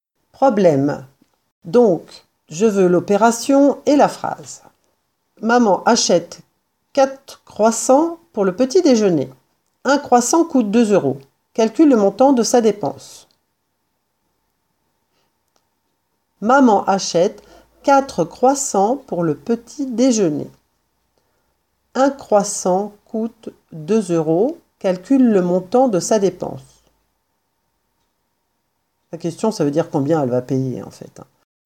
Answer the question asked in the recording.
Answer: L'opération, c'est 4 fois 2 égale 8. La phrase réponse, Le montant de sa dépense est de 8 euros